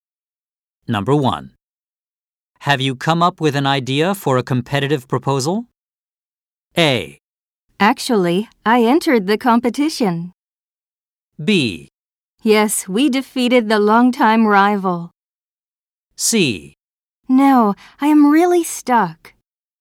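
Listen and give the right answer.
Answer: C: No, I am really stuck.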